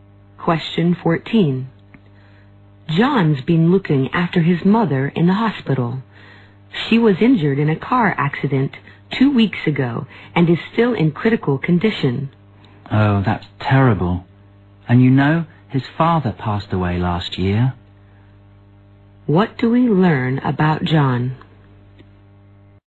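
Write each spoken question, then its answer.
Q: What do we learn about John?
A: He is having a hard time: his mother is in the hospital in critical condition after a car accident, and his father died last year.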